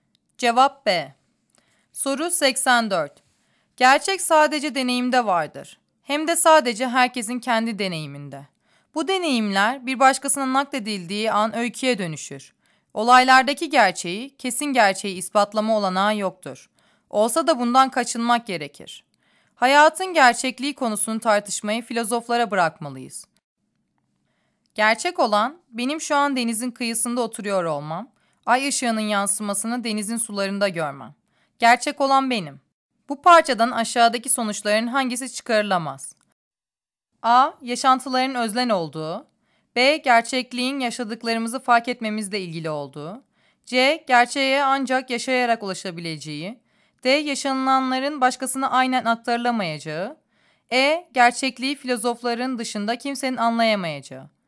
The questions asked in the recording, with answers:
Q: Bu parçadan aşağıdaki sonuçların hangisi çıkarılamaz?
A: Cevap E.